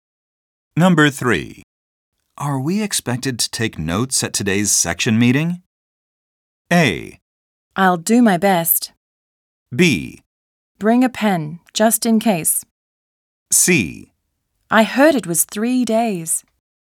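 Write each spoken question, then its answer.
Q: Are we expected to take notes at today's section meeting?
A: B: Bring a pen, just in case.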